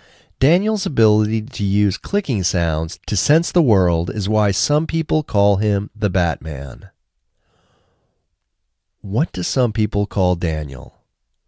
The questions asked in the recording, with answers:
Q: What do some people call Daniel?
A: Some people call Daniel the Batman.